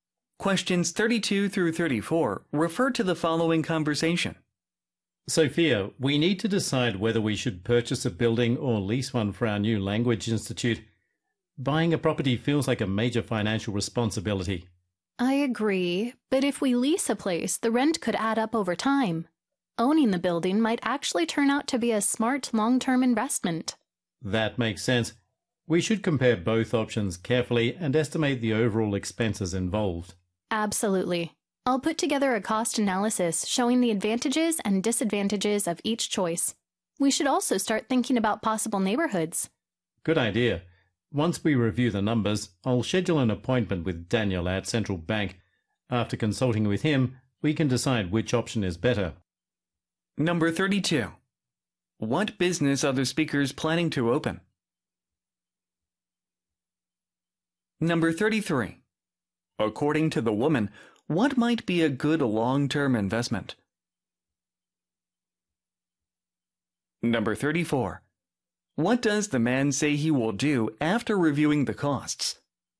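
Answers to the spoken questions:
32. A language institute
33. Owning (buying) the building
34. Schedule an appointment with Daniel at Central Bank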